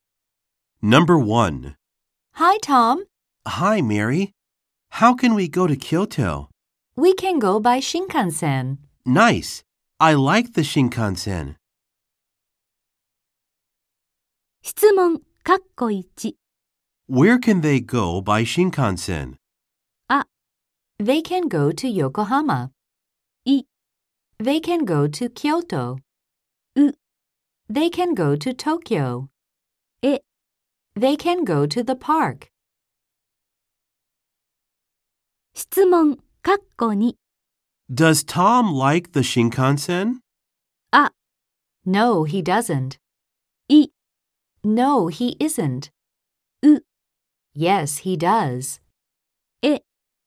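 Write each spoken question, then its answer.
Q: Where can they go by Shinkansen?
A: I: They can go to Kyoto.

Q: Does Tom like the Shinkansen?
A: U: Yes, he does.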